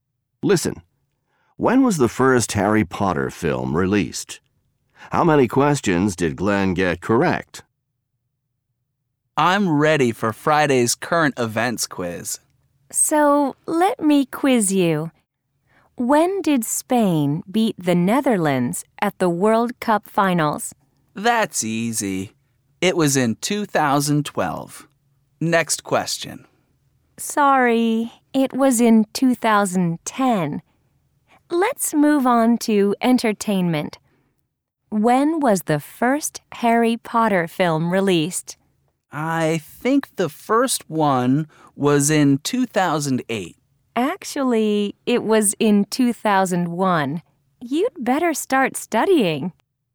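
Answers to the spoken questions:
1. In 2001
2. None (zero)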